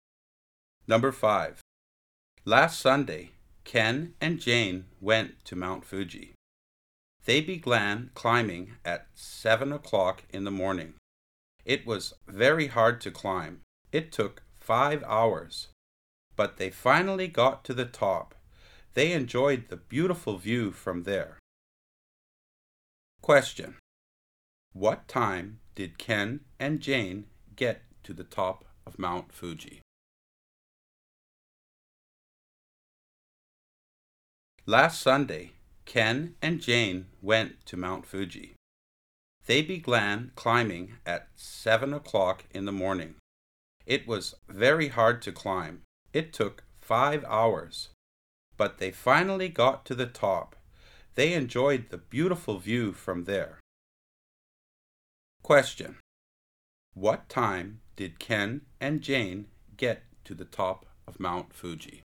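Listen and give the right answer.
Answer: At 12 o'clock (noon).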